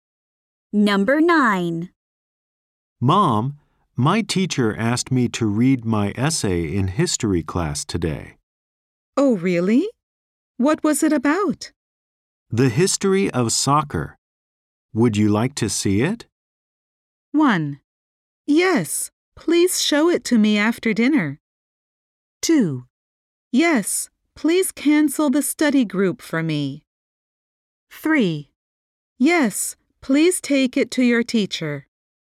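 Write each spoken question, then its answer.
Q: The history of soccer. Would you like to see it?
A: 1: Yes, please show it to me after dinner.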